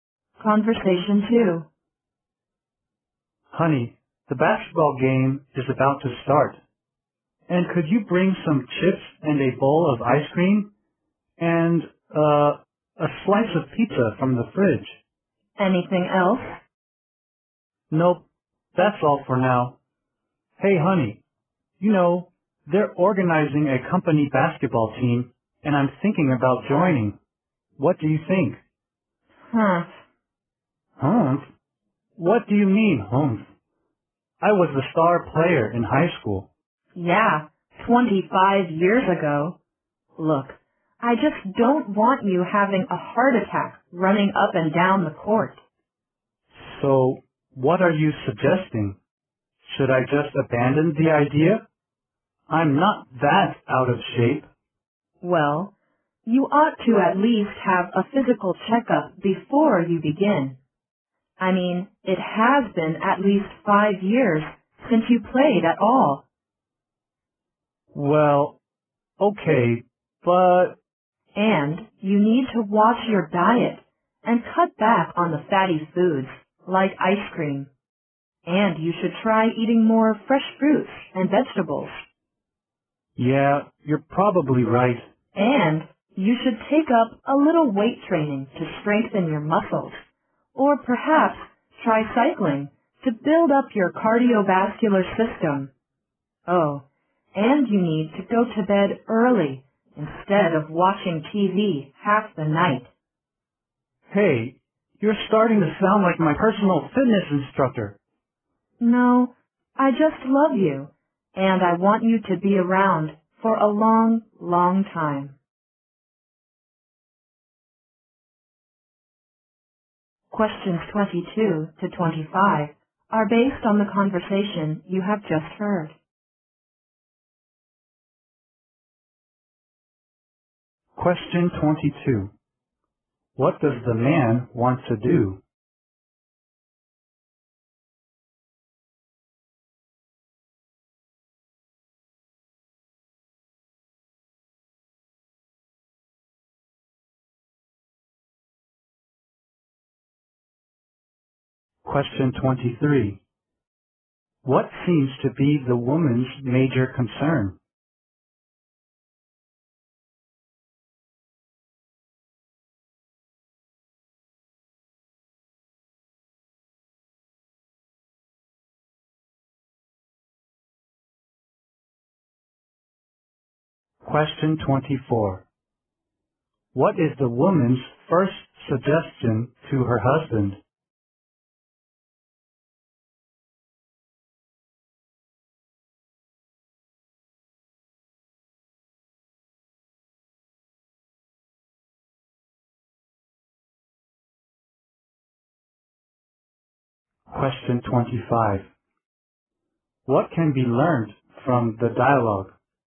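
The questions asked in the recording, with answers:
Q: What does the man want to do?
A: Join the company basketball team.

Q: What seems to be the woman's major concern?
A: His health, that he might have a heart attack.

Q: What is the woman's first suggestion to her husband?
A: Have a physical checkup.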